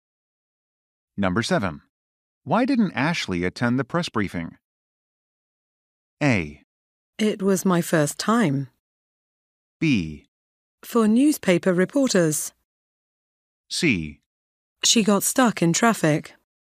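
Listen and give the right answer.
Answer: C: She got stuck in traffic.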